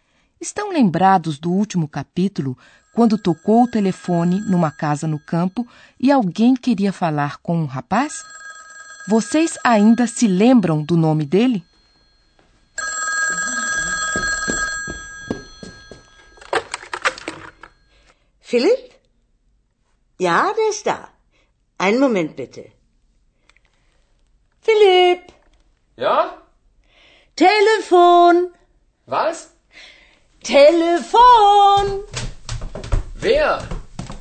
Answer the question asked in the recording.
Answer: Esse jovem chama-se Philip.